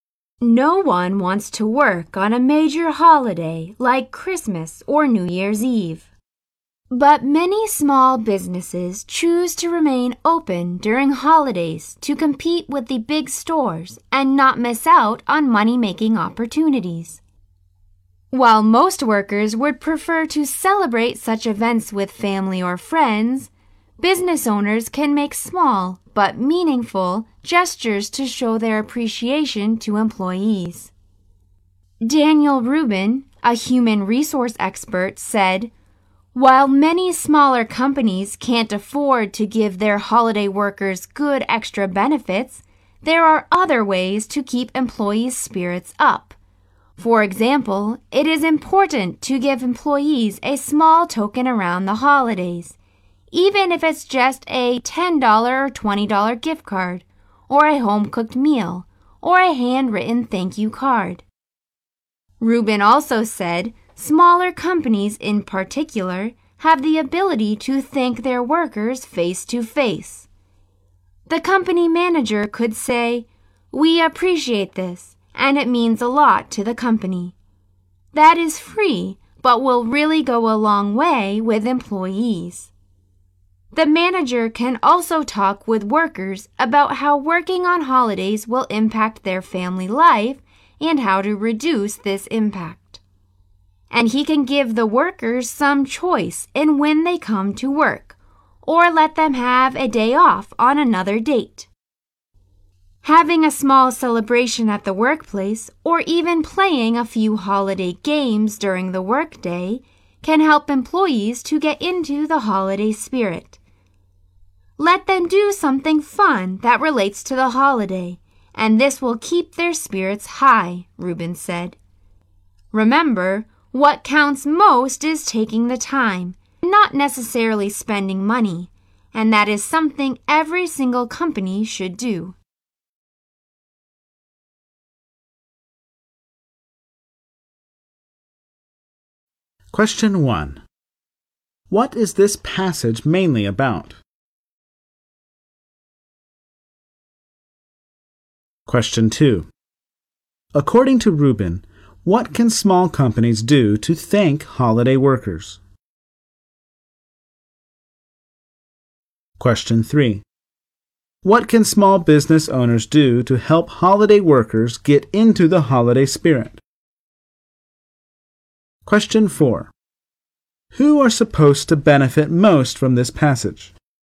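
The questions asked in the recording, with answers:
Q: What is this passage mainly about?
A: How small businesses can show appreciation to holiday workers

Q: What can small business owners do to help holiday workers get into the holiday spirit?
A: Have a small celebration or play holiday games at work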